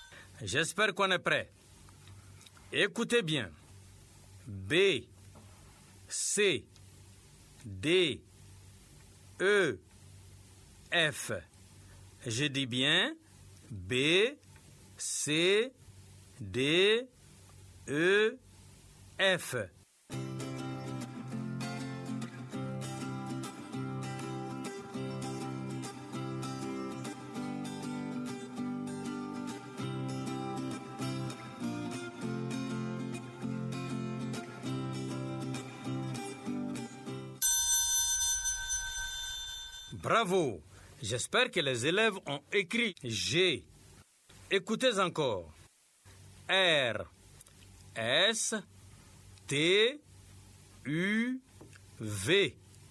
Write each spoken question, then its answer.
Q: B, C, D, E, F. Je dis bien B, C, D, E, F.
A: J'espère que les élèves ont écrit G.